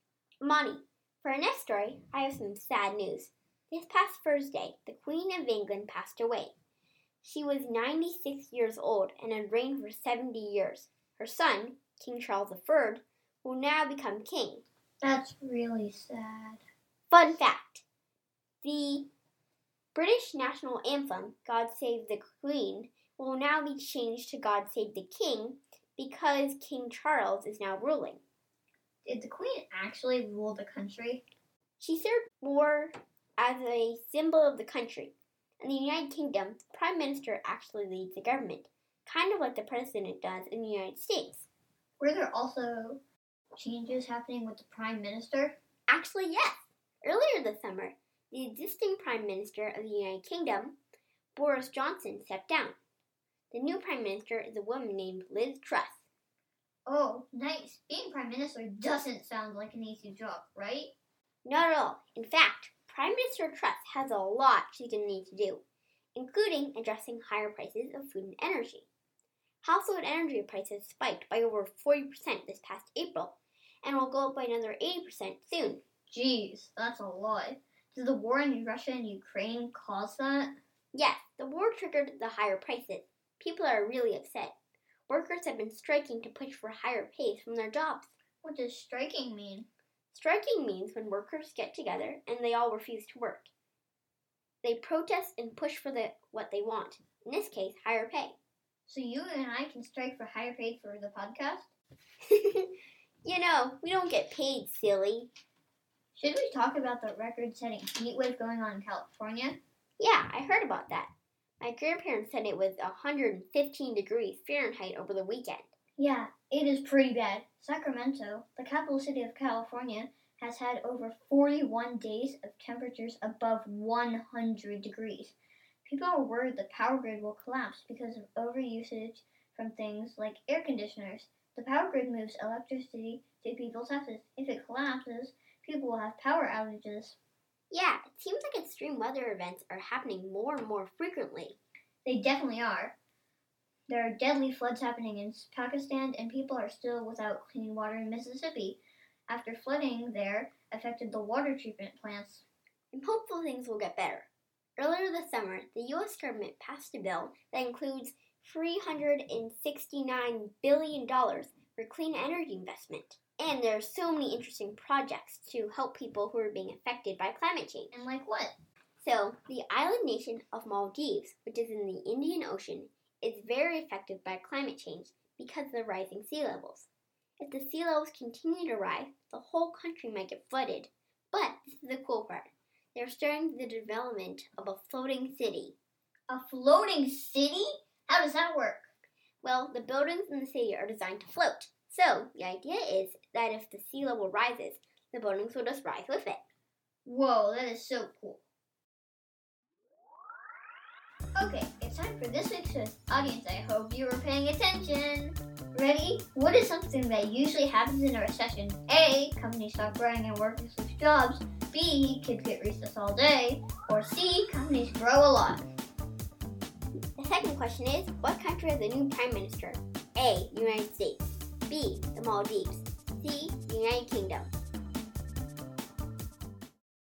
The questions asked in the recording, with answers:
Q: what country has a new prime minister?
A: The United Kingdom.